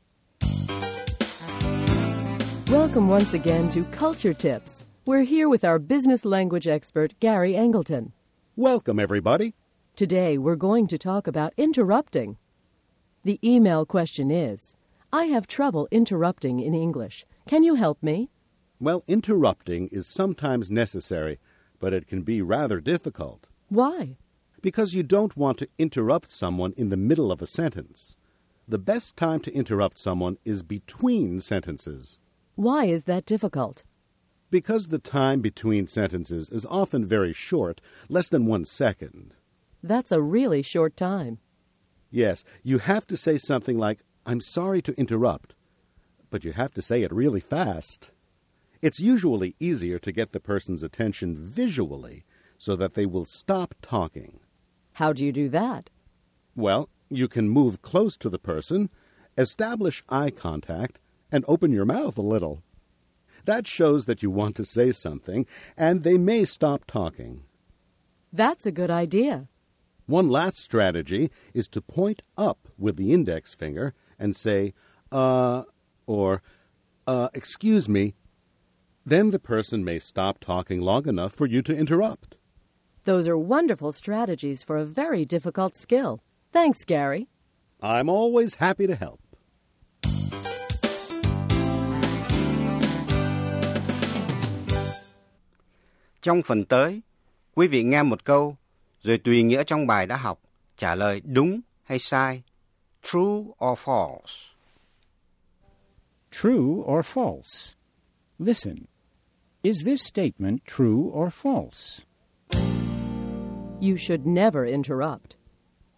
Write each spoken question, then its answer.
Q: You should never interrupt.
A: False. Interrupting is sometimes necessary.